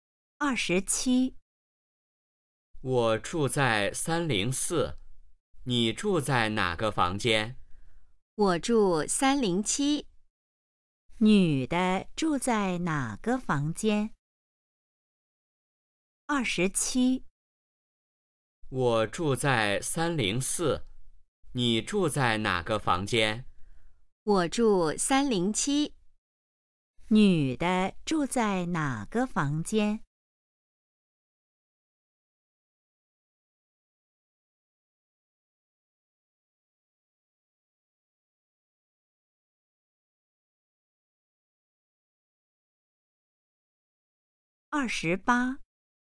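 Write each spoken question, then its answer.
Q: 女的住在哪个房间?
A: 307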